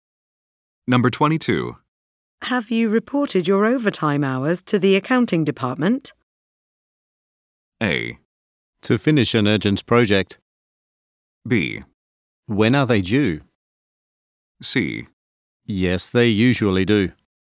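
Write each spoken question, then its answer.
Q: Have you reported your overtime hours to the accounting department?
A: B: When are they due?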